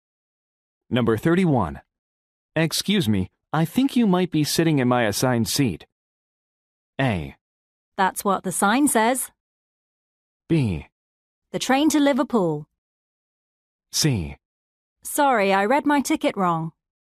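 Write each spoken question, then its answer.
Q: Excuse me, I think you might be sitting in my assigned seat.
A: C: Sorry, I read my ticket wrong.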